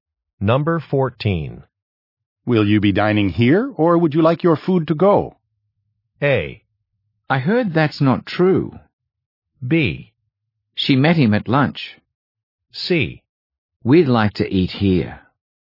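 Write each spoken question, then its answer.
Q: Will you be dining here, or would you like your food to go?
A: C: We'd like to eat here.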